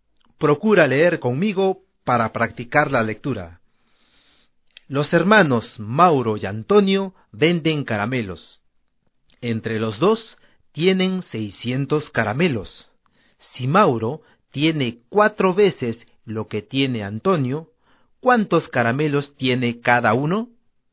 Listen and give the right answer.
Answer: Antonio tiene 120, ¿no es cierto? ¿Y Mauro? Mauro tiene 480 caramelos.